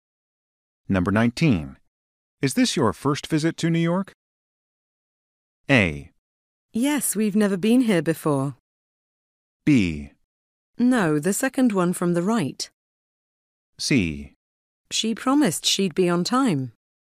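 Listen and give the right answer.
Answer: A: Yes, we've never been here before.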